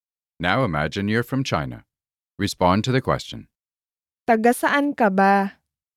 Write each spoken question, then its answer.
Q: Taga saan ka ba?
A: Taga China ako.